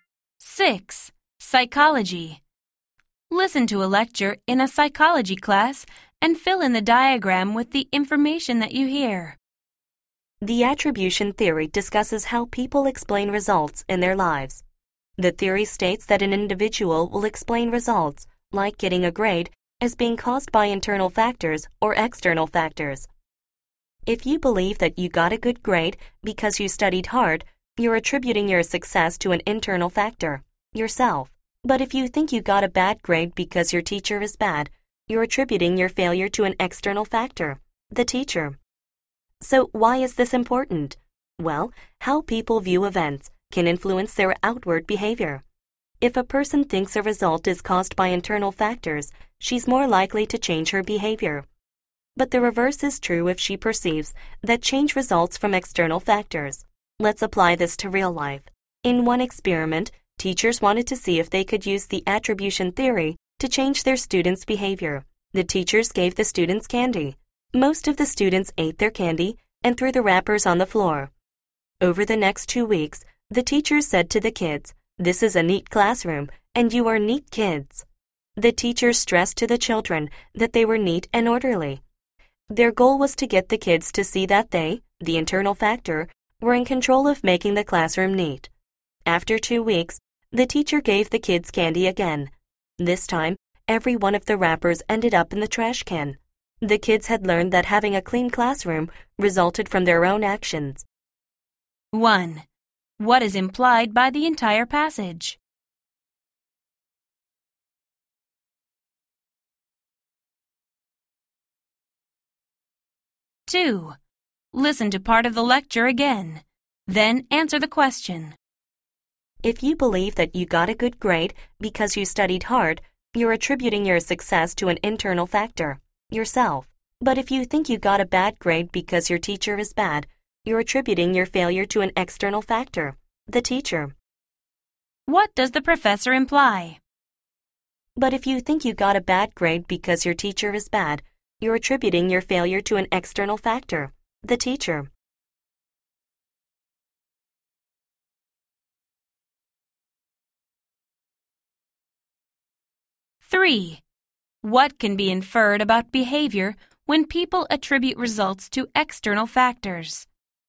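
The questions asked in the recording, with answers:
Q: What can be inferred about behavior when people attribute results to external factors?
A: They are less likely to change their behavior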